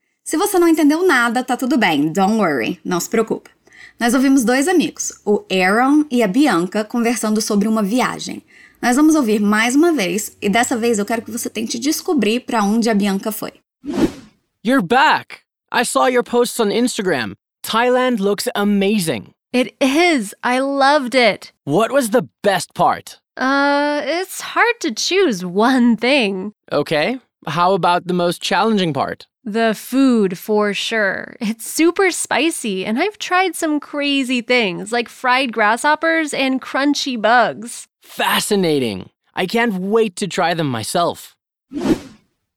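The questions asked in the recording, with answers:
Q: Nós vamos ouvir mais uma vez e dessa vez eu quero que você tente descobrir para onde a Bianca foi.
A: Para a Tailândia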